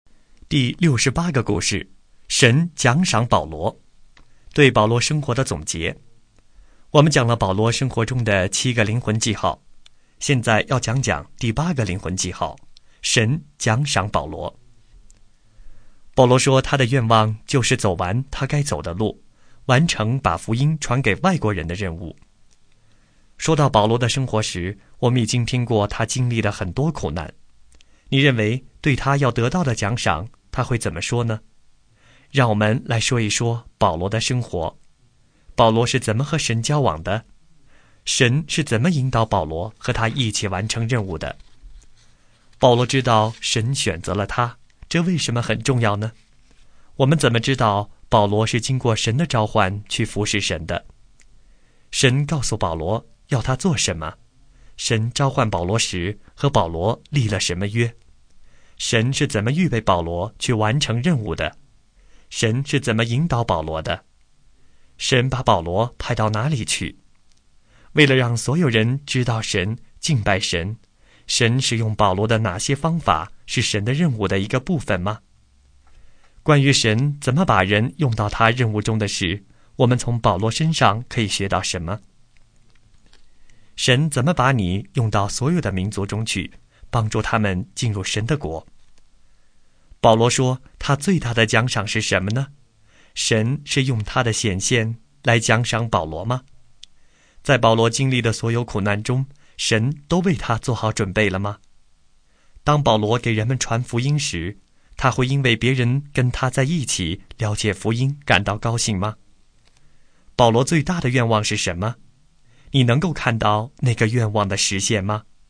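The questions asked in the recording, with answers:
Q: 保罗最大的愿望是什么?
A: 走完他该走的路,完成把福音传给外国人的任务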